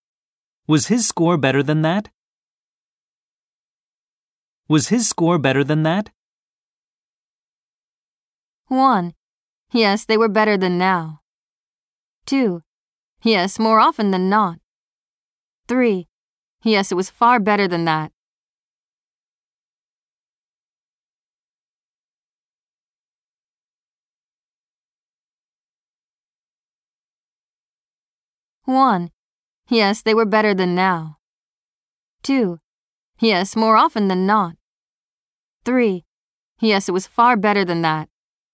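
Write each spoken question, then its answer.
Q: Was his score better than that?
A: 3: Yes, it was far better than that.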